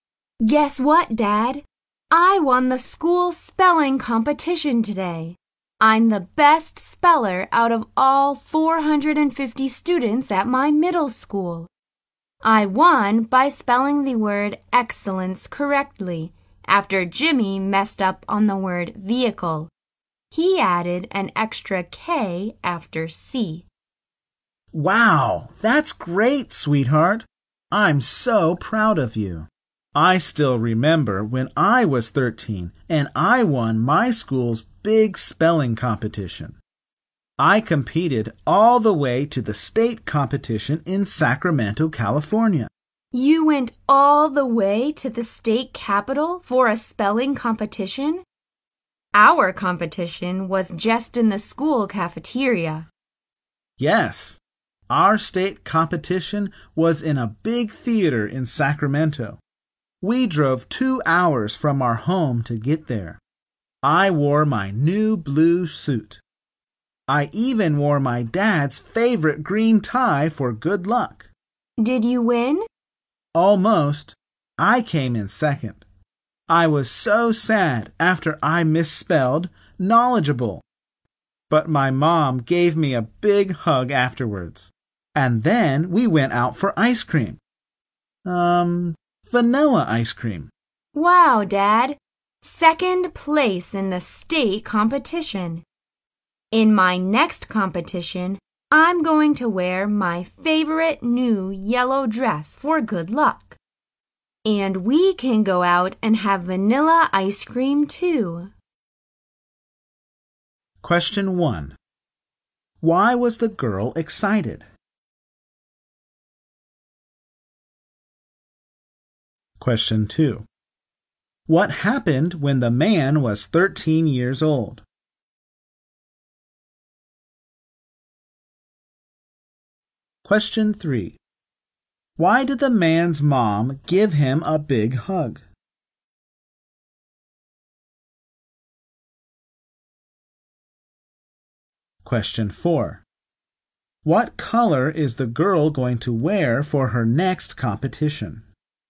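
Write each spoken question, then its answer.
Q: Why was the girl excited?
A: She won the school spelling competition.

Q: What happened when the man was 13 years old?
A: He won his school's spelling competition and came second in the state competition.

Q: Why did the man's mom give him a big hug?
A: He was sad after misspelling a word and coming second.

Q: What color is the girl going to wear for her next competition?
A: Yellow.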